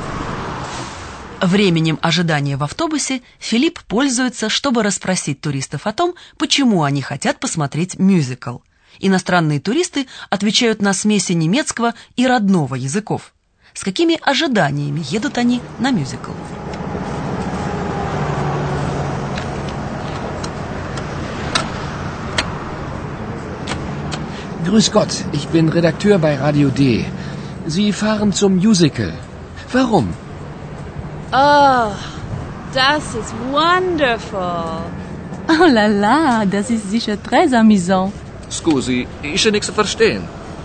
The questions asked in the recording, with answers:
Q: С какими ожиданиями едут они на мюзикл?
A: Женщина с английским акцентом представляет себе, что мюзикл будет великолепным.